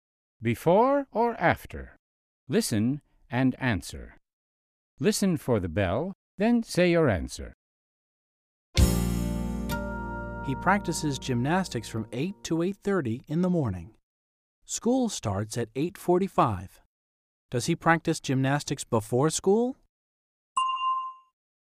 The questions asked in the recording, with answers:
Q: Does he practice gymnastics before school?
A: Yes, he does. He practices gymnastics before school.